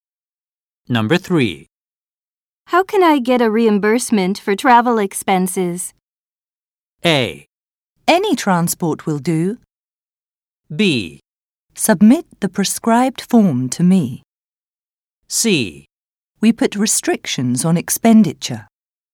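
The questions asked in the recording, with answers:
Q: How can I get a reimbursement for travel expenses?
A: B: Submit the prescribed form to me.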